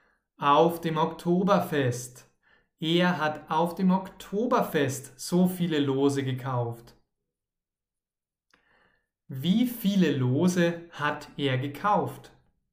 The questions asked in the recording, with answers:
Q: Wie viele Lose hat er gekauft?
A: Tausend. Er hat tausend Lose gekauft,